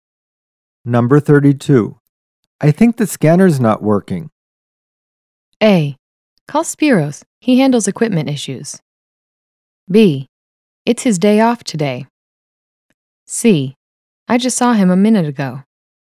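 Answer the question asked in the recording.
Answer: A: Call Spiros. He handles equipment issues.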